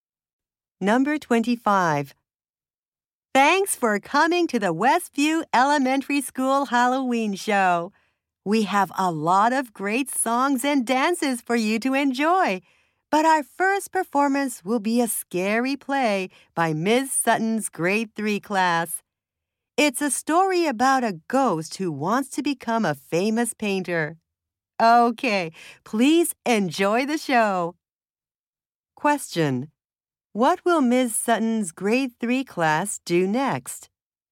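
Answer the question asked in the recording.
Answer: Perform a scary play.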